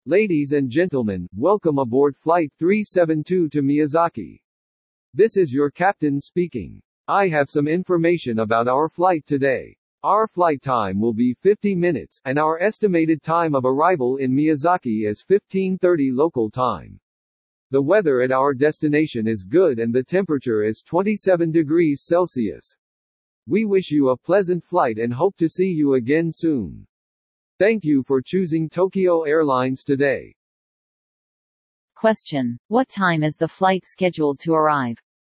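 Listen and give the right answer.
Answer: 15:30 local time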